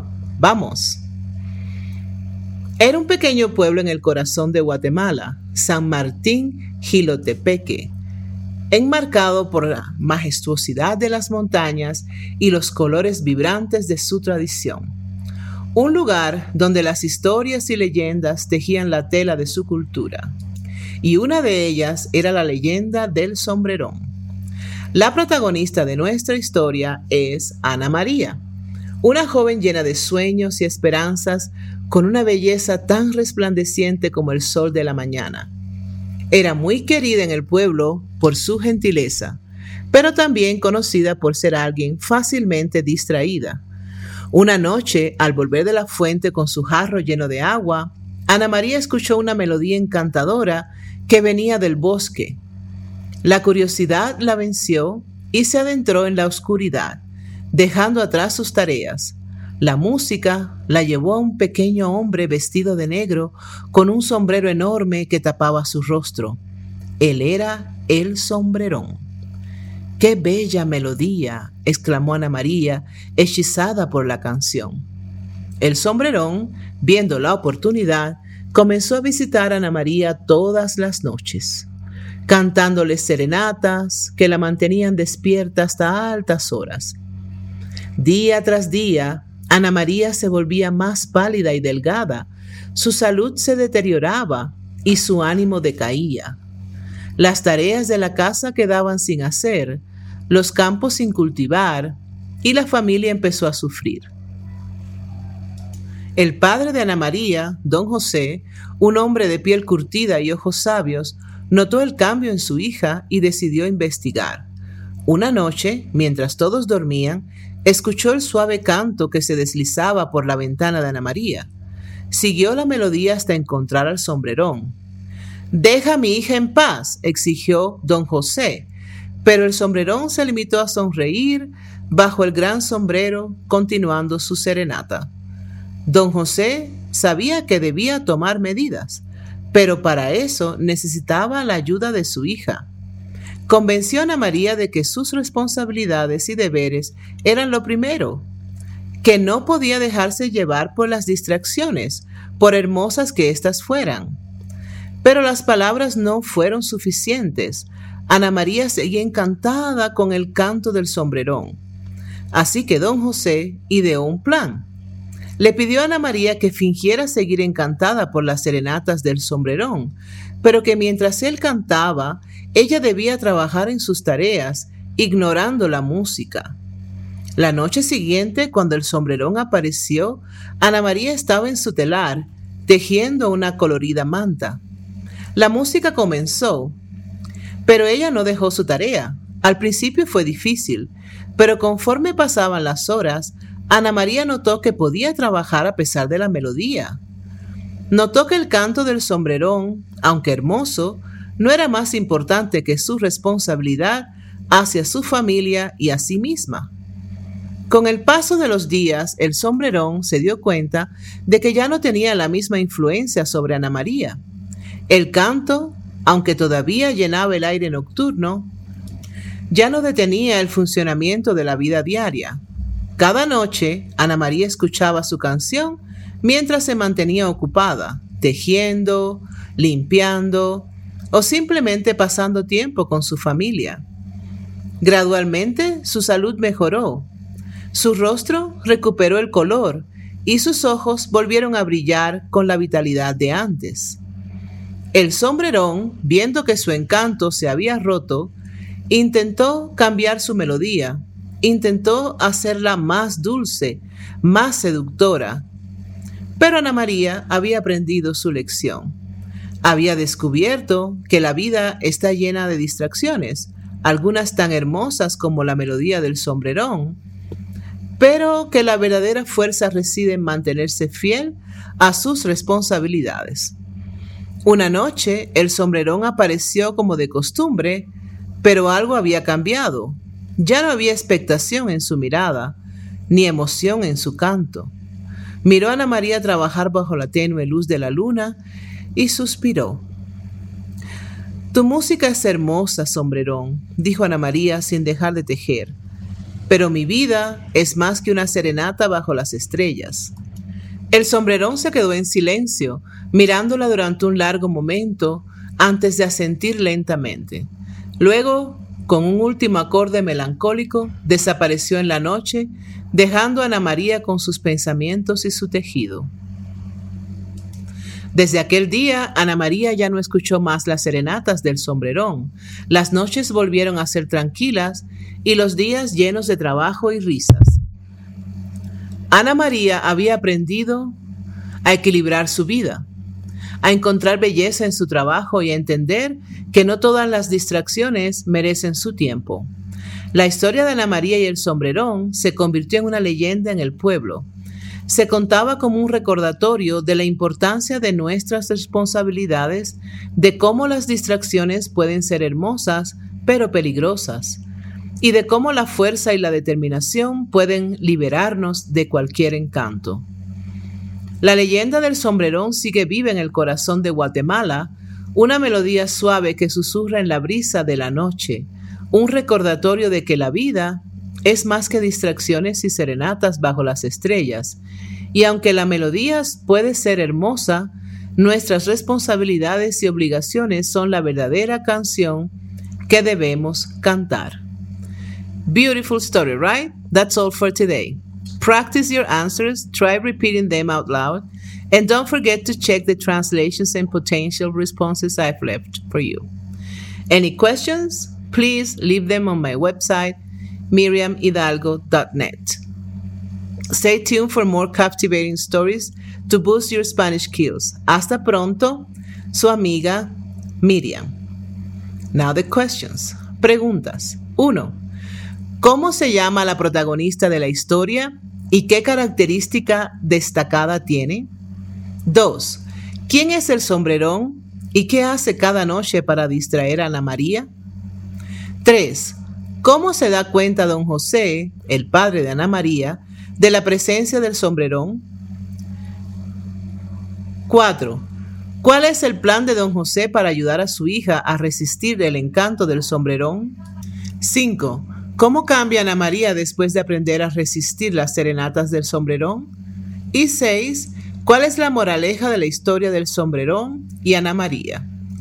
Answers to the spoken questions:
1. La protagonista se llama Ana María y es conocida por ser fácilmente distraída.
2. El sombrerón es un pequeño hombre vestido de negro que canta serenatas a Ana María todas las noches para distraerla.
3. Don José se da cuenta de la presencia del sombrerón cuando escucha su canto una noche mientras todos los demás dormían.
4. El plan de don José es que Ana María finja seguir encantada por las serenatas del sombrerón, pero que mientras él canta, ella debe continuar con sus tareas, ignorando la música.
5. Después de aprender a resistir las serenatas del sombrerón, Ana María mejora su salud, se concentra más en su trabajo y pasa más tiempo con su familia.
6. La moraleja de la historia es la importancia de las responsabilidades y cómo las distracciones, aunque hermosas, no deben interponerse en nuestras obligaciones.